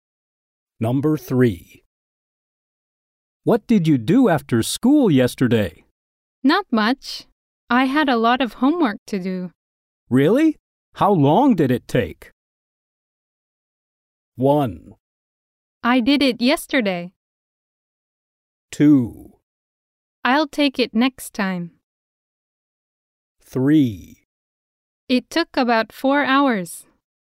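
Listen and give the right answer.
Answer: 3: It took about 4 hours.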